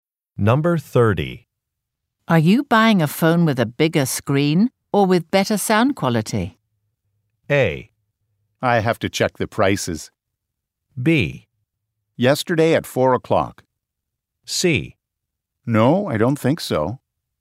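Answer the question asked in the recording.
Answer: A: I have to check the prices.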